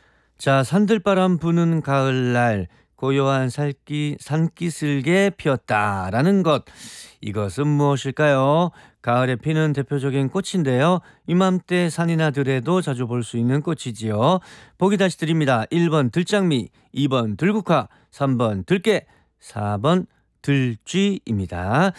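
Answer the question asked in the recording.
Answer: 2: 들국화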